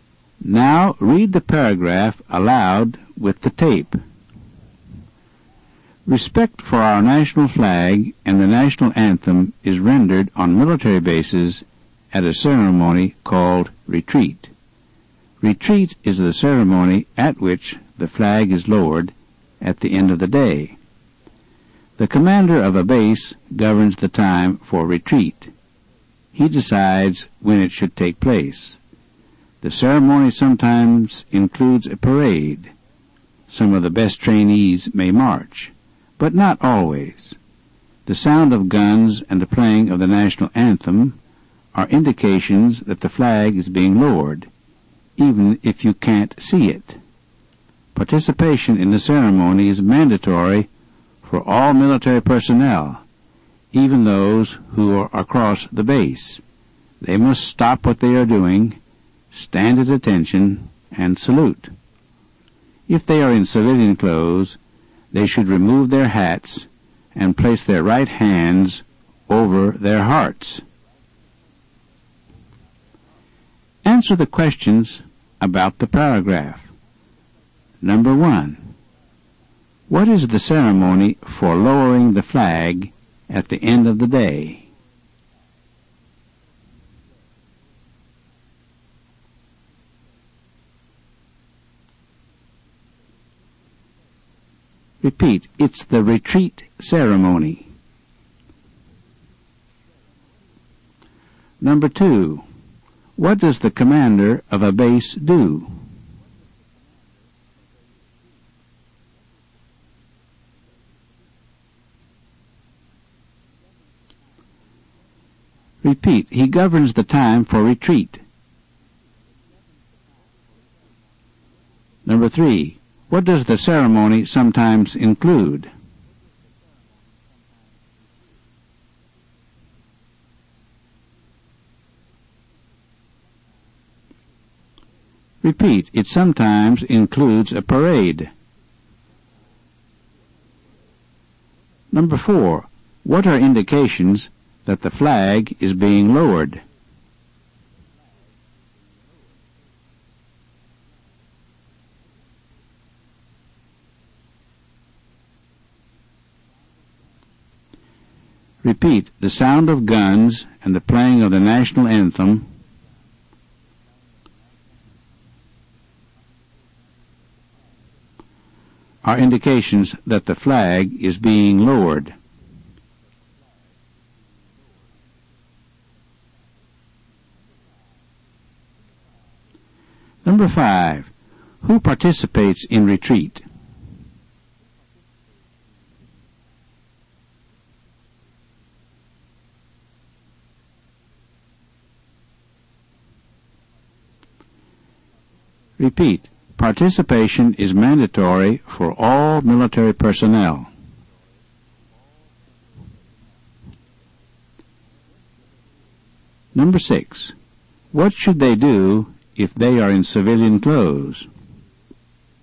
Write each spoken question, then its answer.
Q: what is the ceremony for lowering the flag at the end of the day?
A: it's the retreat ceremony.

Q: what does the commander of a base do?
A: he governs the time for retreat.

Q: what does the ceremony sometimes include?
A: it sometimes includes a parade.

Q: what are indications that the flag is being lowered?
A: the sound of guns and the playing of the national anthem.

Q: who participates in retreat?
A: Participation is mandatory for all military personnel.

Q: what should they do if they are in civilian clothes?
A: they should remove their hats